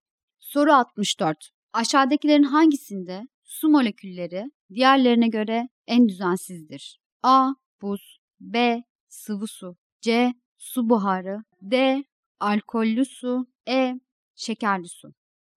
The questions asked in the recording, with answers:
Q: Aşağıdakilerin hangisinde su molekülleri diğerlerine göre en düzensizdir?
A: Doğru cevap C şıkkı.